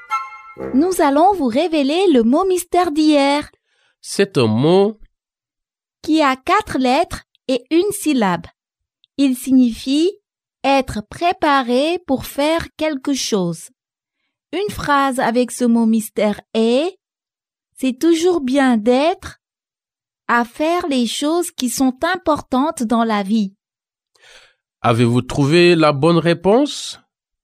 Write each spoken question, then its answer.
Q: Avez-vous trouvé la bonne réponse?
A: Le mot mystère d'aujourd'hui est « prêt ».